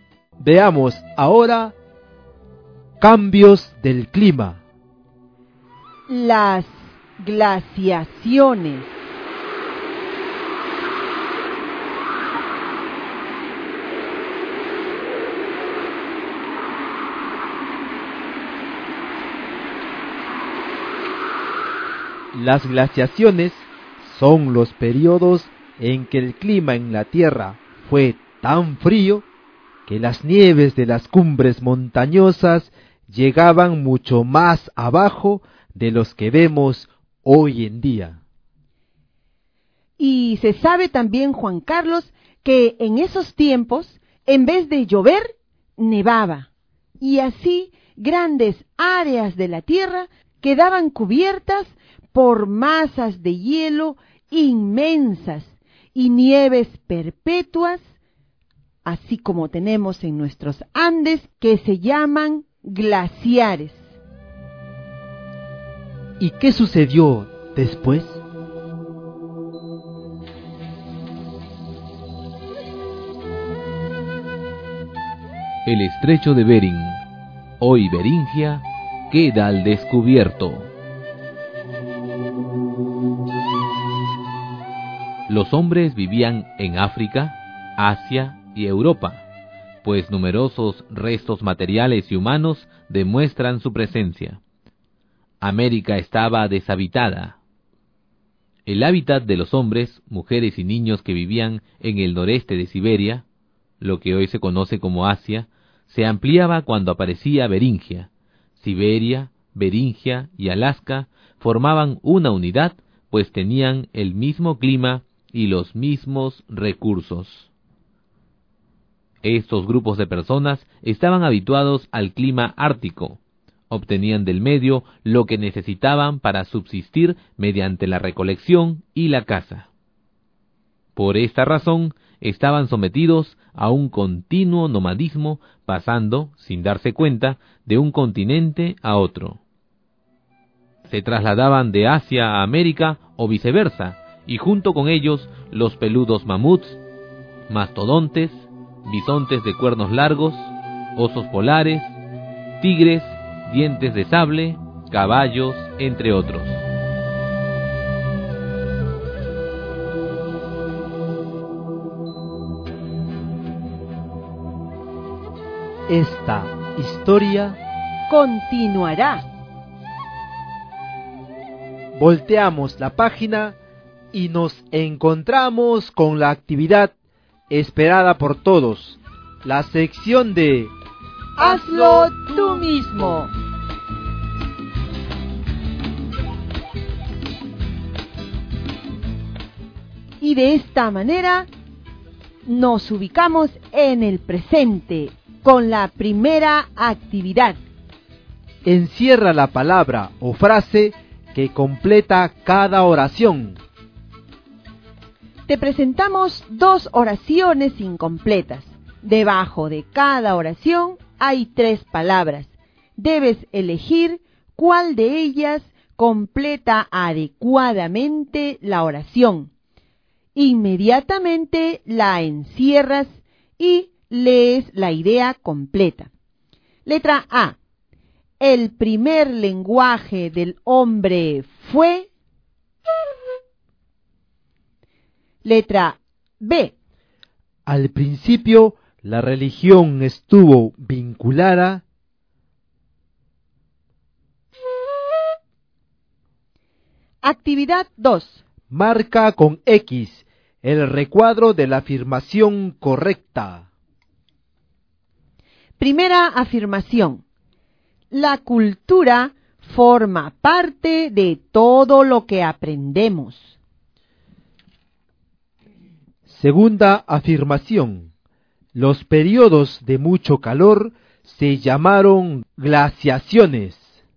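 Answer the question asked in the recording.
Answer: Falso (fueron periodos de mucho frío)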